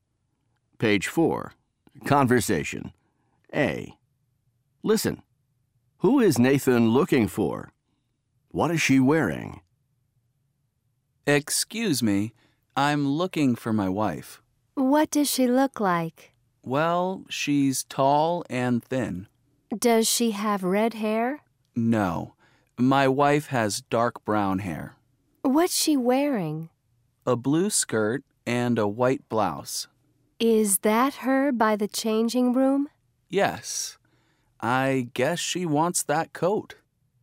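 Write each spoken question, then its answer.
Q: Who is Nathan looking for?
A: His wife

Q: What is she wearing?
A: A blue skirt and a white blouse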